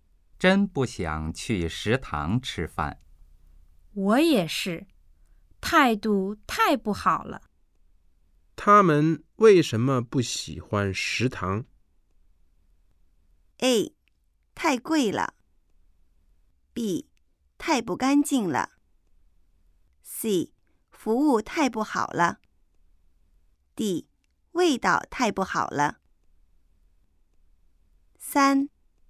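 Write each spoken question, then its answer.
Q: 他们为什么不喜欢食堂?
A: C: 服务太不好了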